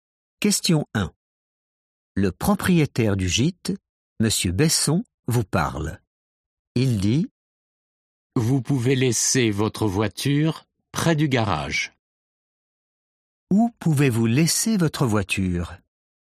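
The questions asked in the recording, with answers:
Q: Où pouvez-vous laisser votre voiture?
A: près du garage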